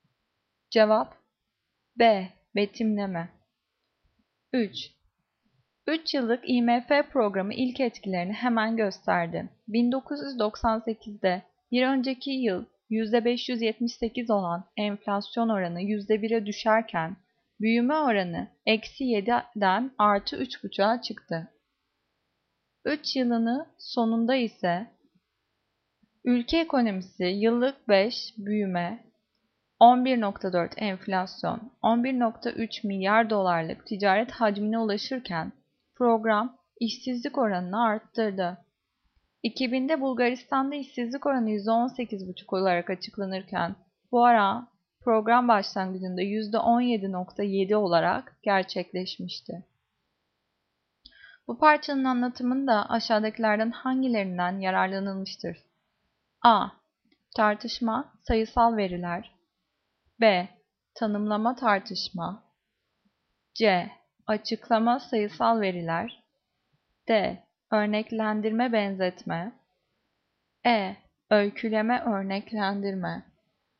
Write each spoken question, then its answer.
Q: Bu parçanın anlatımında aşağıdakilerden hangilerinden yararlanılmıştır?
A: Cevap C. Açıklama, sayısal veriler.